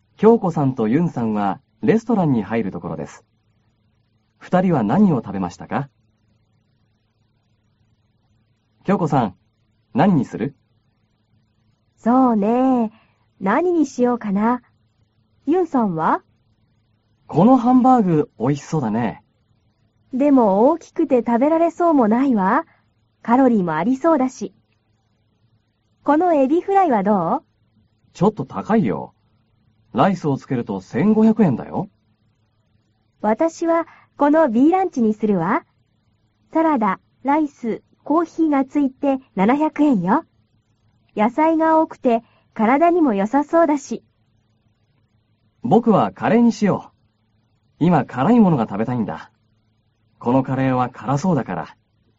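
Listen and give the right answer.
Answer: 京子さんはBランチ(サラダ・ライス・コーヒー付き)、ユンさんはカレー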